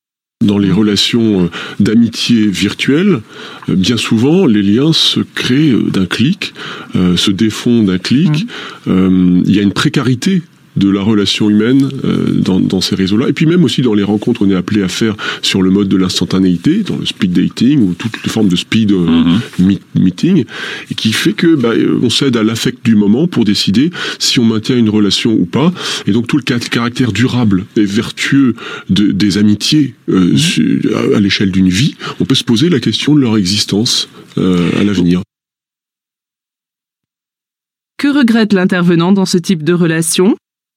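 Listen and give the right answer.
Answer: La précarité des liens : ils se créent et se défont d'un clic, sans amitié durable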